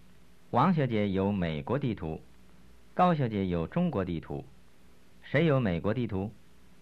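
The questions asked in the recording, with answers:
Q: 谁有美国地图?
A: 王小姐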